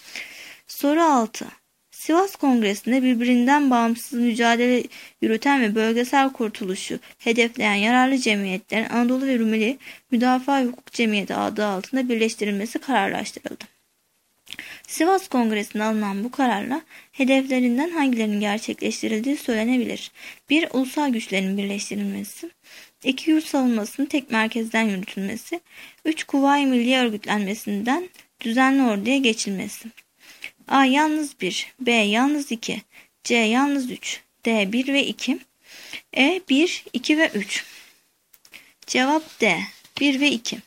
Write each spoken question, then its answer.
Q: Sivas Kongresi'nde alınan bu kararla hedeflerinden hangilerinin gerçekleştirildiği söylenebilir.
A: Cevap D. 1 ve 2.